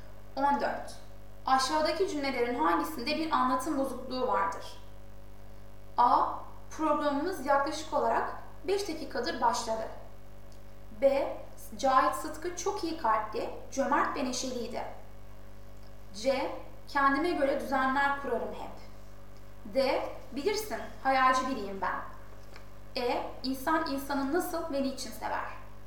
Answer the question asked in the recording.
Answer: Doğru yanıt A.